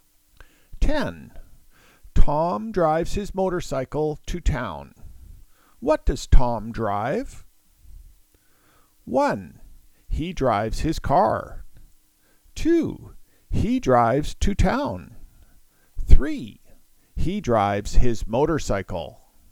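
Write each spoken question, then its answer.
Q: What does Tom drive?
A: 3: He drives his motorcycle.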